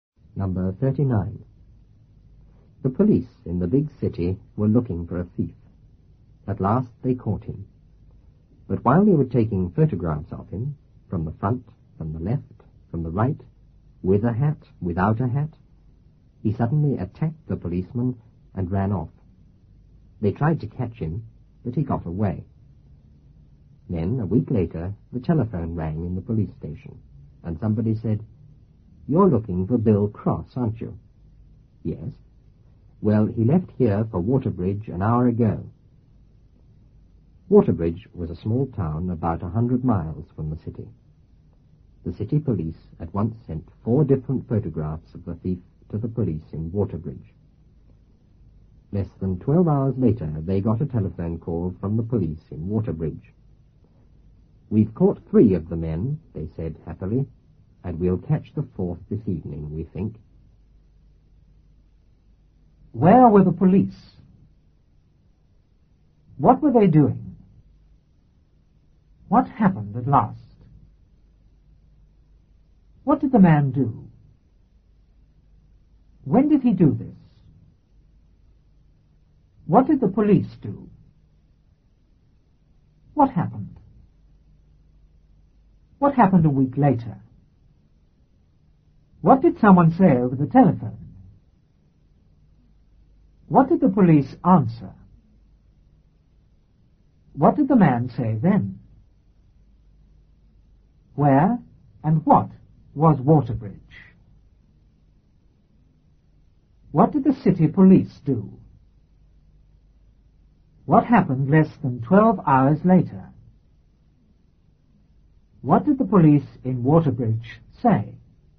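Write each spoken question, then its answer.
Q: Where were the police?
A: In the big city

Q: What were they doing?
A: Looking for a thief

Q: What happened at last?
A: They caught him

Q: What did the man do?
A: He attacked the policeman and ran off

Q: When did he do this?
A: While they were taking photographs of him

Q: What did the police do?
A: They tried to catch him

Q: What happened?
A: He got away

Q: What happened a week later?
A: The telephone rang in the police station

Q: What did someone say over the telephone?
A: You're looking for Bill Cross, aren't you?

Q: What did the police answer?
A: Yes

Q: What did the man say then?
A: He left here for Waterbridge an hour ago

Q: Where and what was Waterbridge?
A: A small town about 100 miles from the city

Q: What did the city police do?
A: Sent 4 different photographs of the thief to the police in Waterbridge

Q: What happened less than 12 hours later?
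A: They got a telephone call from the police in Waterbridge

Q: What did the police in Waterbridge say?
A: We've caught 3 of the men, and we'll catch the 4th this evening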